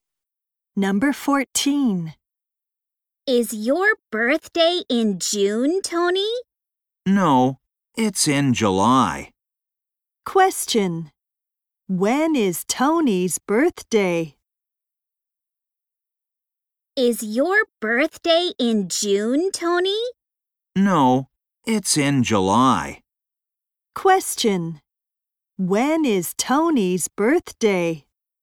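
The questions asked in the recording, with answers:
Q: When is Tony's birthday?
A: In July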